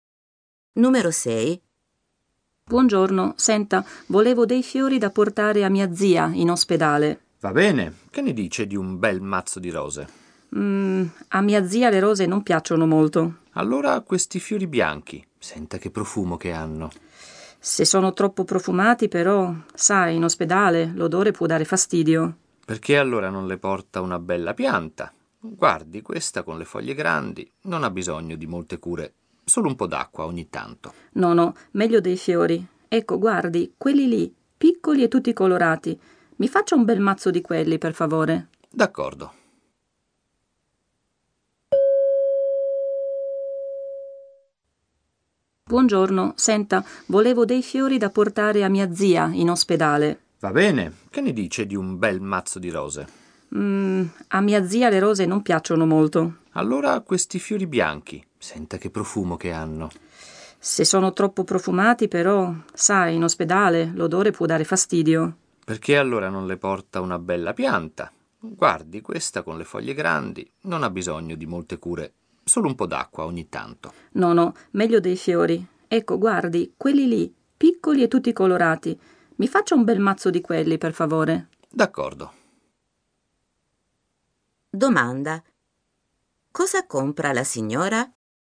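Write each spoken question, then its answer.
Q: Domanda. Cosa compra la signora?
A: Un mazzo di fiori piccoli e colorati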